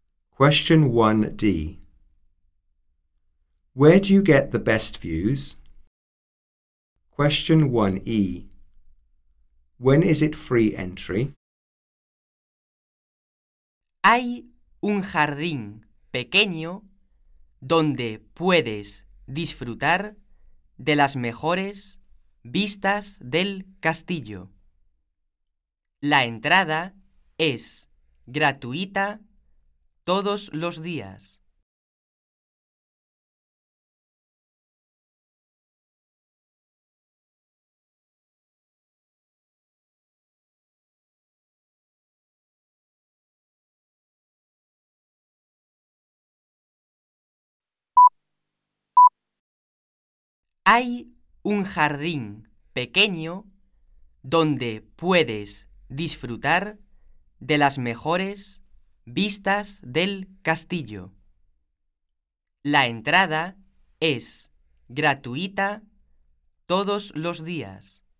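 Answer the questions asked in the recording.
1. From a small garden
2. Every day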